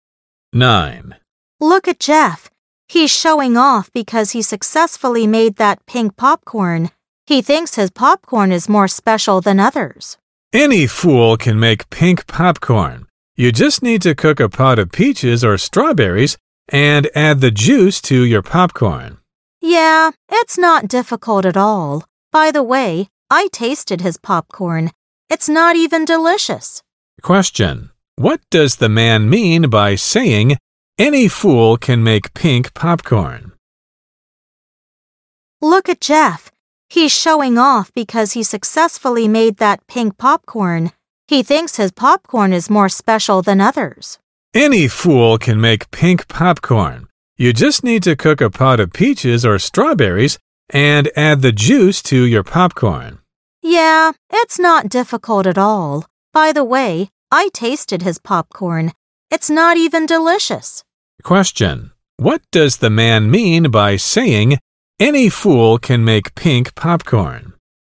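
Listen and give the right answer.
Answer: Making pink popcorn is easy, nothing special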